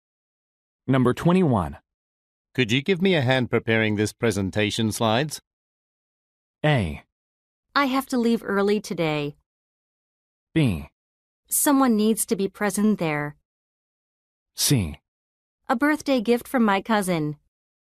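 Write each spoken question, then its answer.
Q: Could you give me a hand preparing this presentation slides?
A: A: I have to leave early today.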